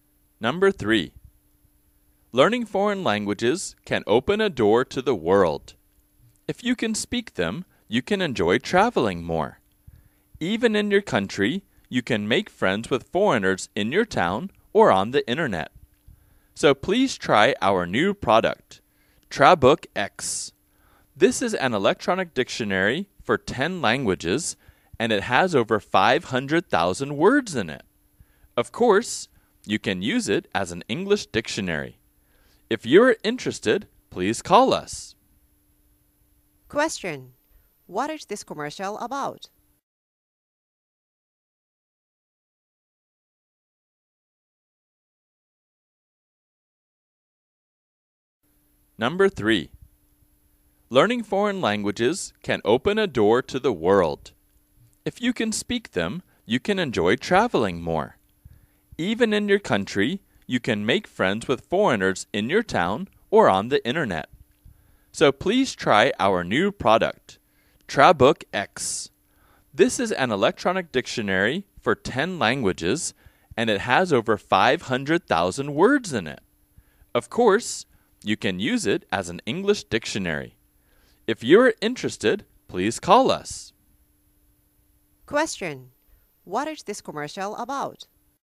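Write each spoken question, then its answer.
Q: what is this commercial about?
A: An electronic dictionary (Trabook X) for 10 languages.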